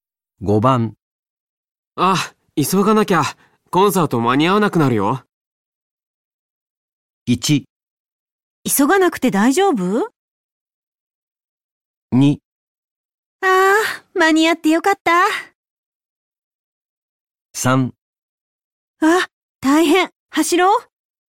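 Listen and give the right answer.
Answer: 3: あ、大変、走ろう。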